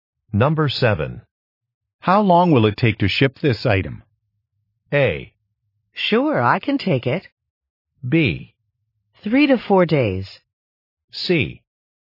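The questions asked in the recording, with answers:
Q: How long will it take to ship this item?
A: B: 3 to 4 days.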